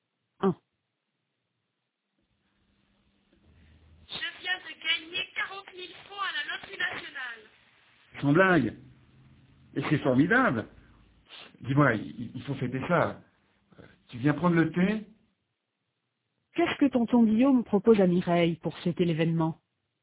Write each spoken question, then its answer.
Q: Qu'est-ce que tonton Guillaume propose à Mireille pour fêter l'événement?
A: Il lui propose de prendre le thé.